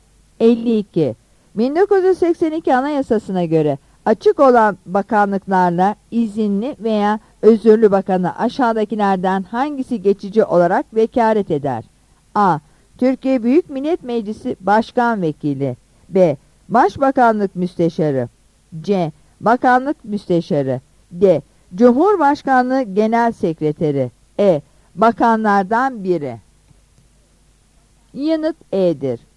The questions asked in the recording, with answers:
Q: 1982 Anayasası'na göre açık olan bakanlıklarla izinli veya özürlü bakanı aşağıdakilerden hangisi geçici olarak vekalet eder?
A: Yanıt E'dir.